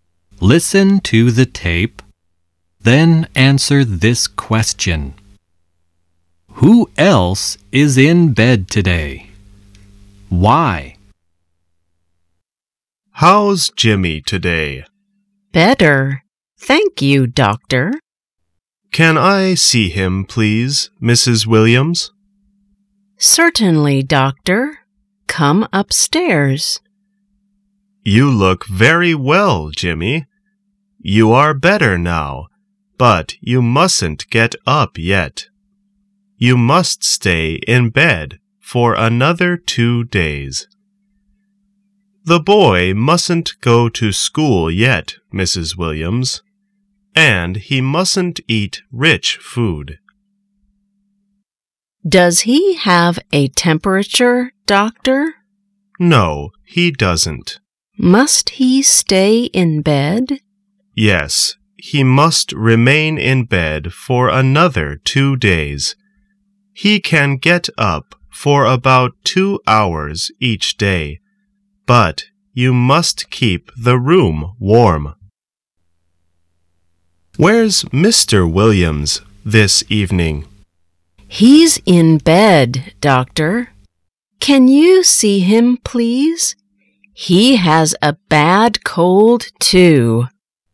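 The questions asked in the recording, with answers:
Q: Who else is in bed today?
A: Mr. Williams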